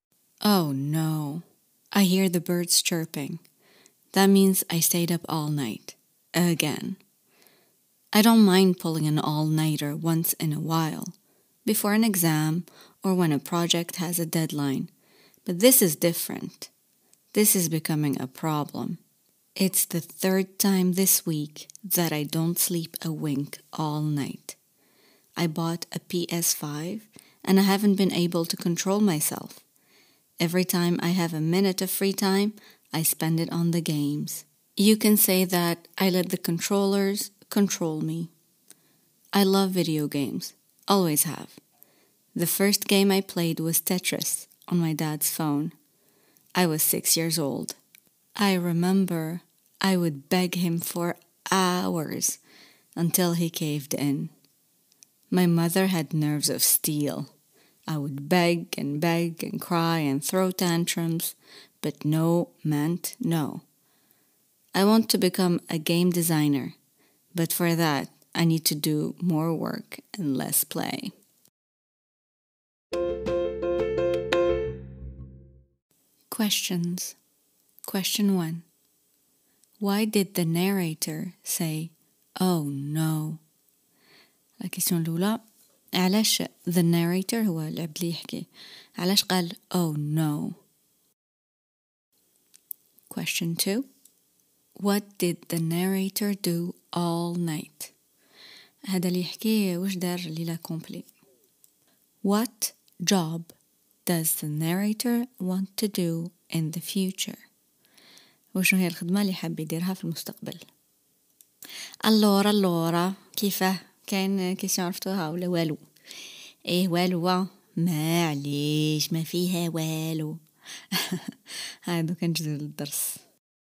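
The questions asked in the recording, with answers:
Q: Why did the narrator say, Oh no?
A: He heard the birds chirping, which meant he had stayed up all night again

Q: what did the narrator do all night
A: Played video games on his PS5

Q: what job does the narrator want to do in the future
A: A game designer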